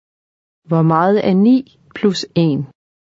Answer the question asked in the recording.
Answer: 10. 10.